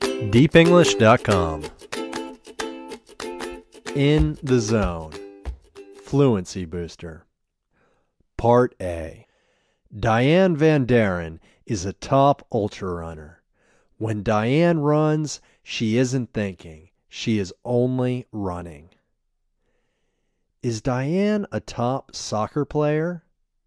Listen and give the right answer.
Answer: No, Diane isn't a top soccer player.